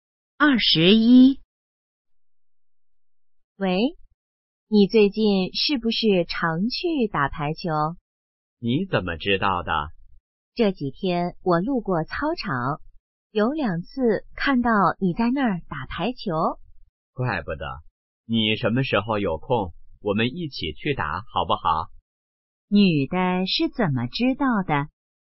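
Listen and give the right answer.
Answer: 路过操场时看到男的在打排球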